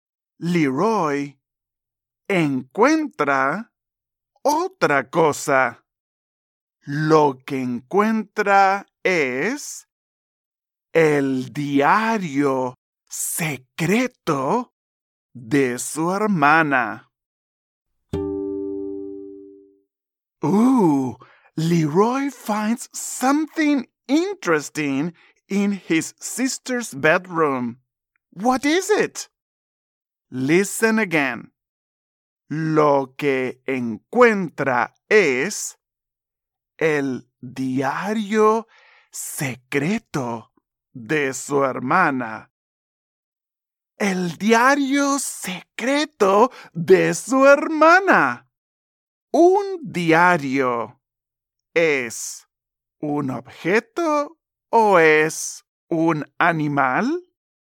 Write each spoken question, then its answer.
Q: ¿Es un objeto o es un animal?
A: Correcto. Es un objeto.